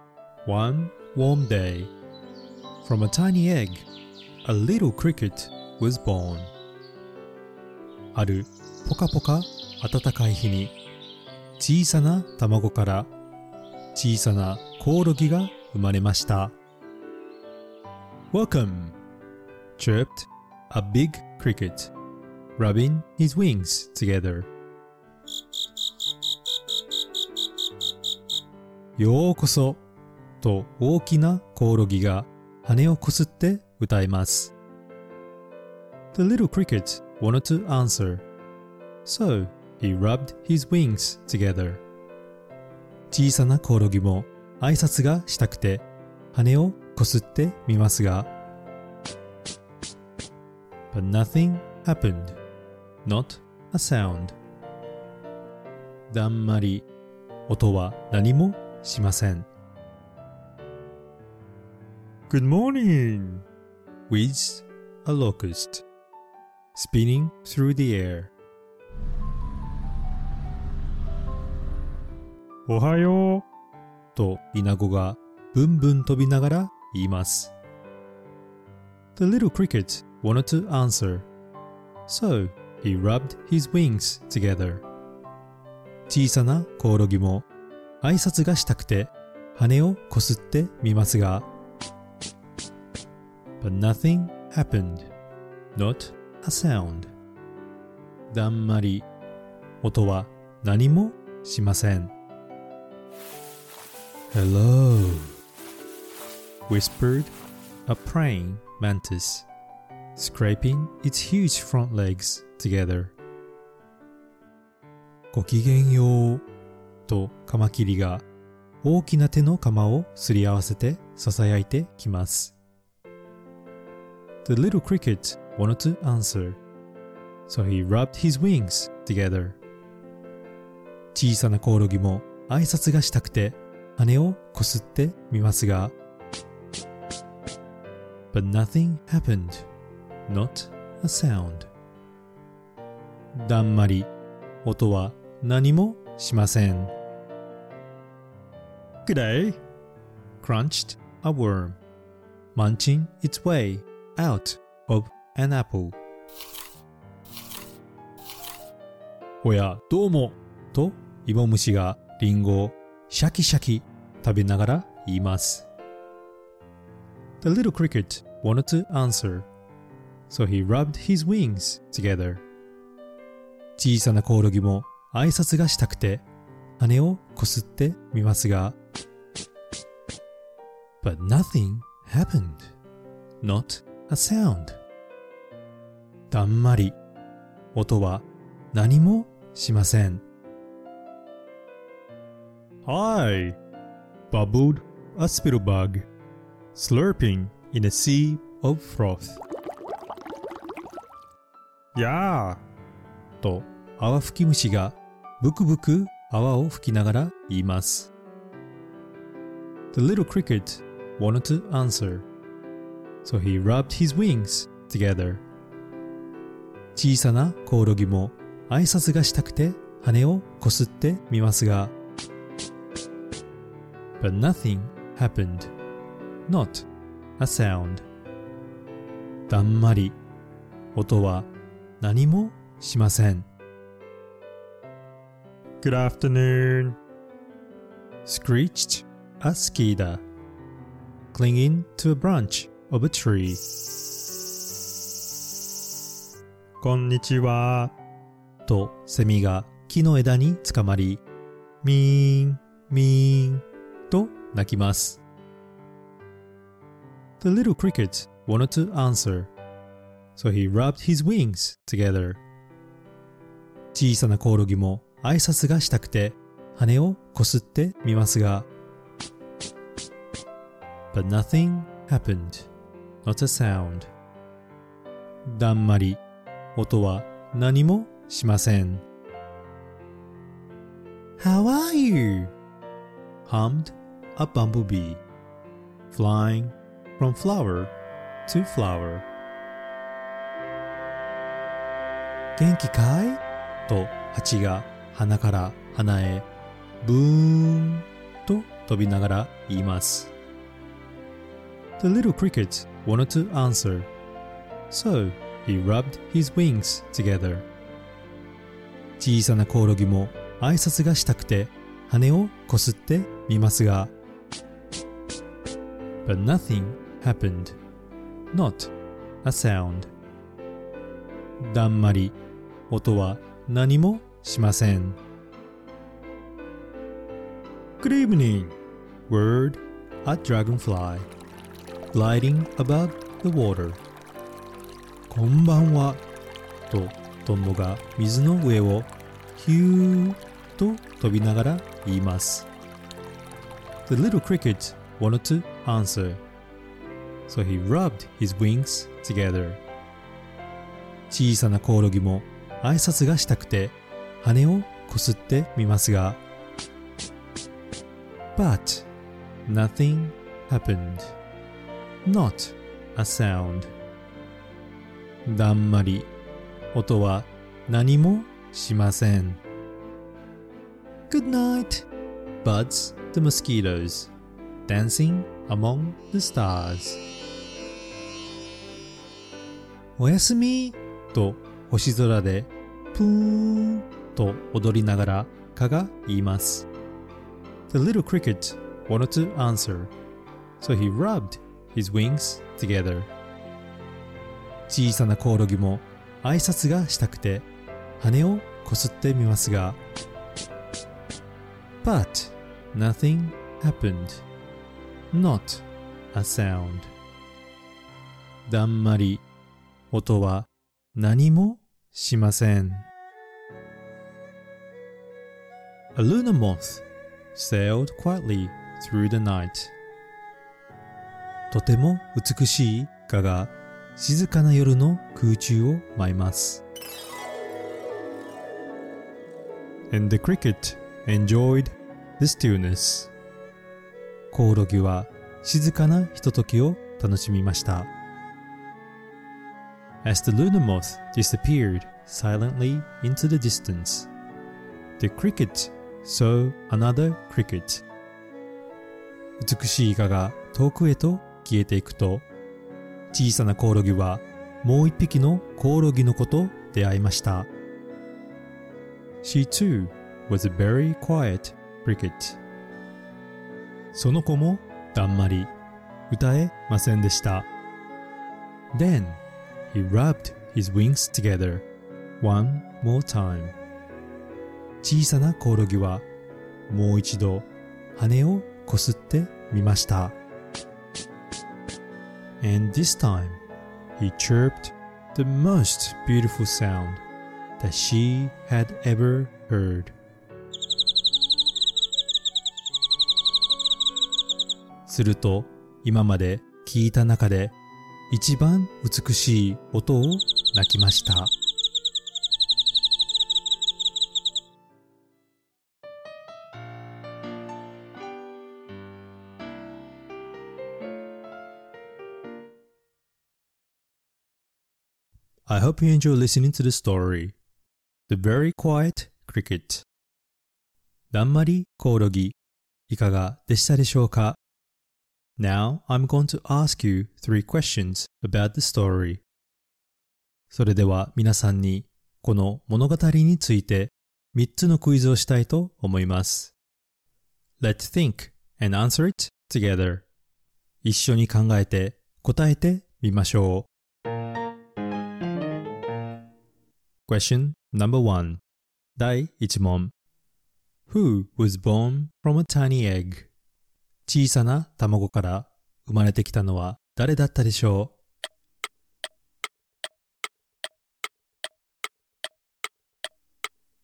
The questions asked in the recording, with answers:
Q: Who was born from a tiny egg?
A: 答えは小さなコオロギです。